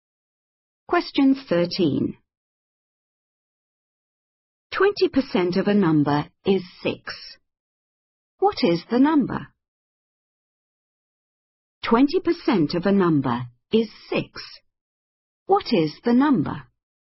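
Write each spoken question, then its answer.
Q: 20% of a number is 6. What is the number?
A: 30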